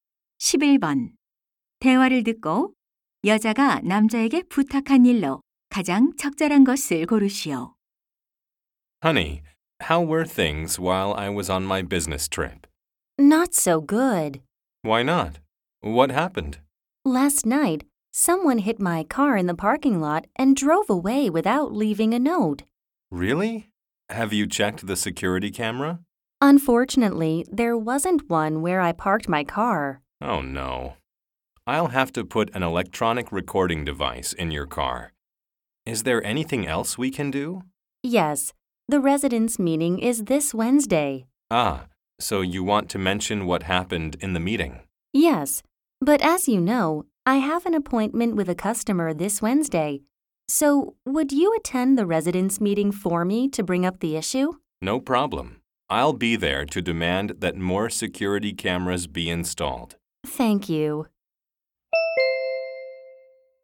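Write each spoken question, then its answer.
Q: 대화를 듣고 여자가 남자에게 부탁한 일로 가장 적절한 것을 고르시오.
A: 자신 대신 주민 회의에 참석하기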